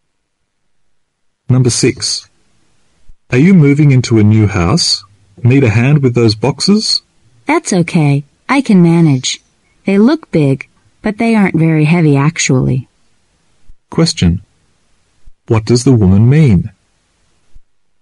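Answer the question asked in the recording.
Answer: She doesn't need help because the boxes aren't heavy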